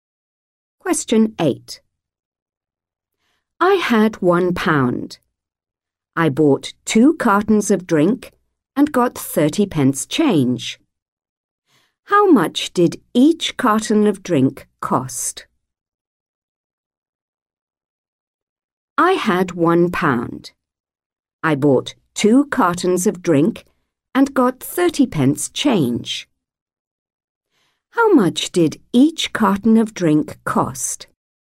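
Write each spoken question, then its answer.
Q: How much did each carton of drink cost?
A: 35 pence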